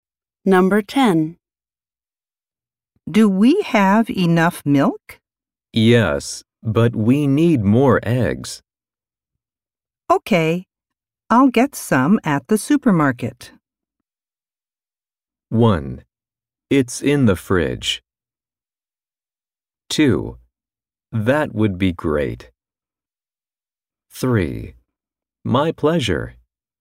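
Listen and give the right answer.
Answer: 2: That would be great.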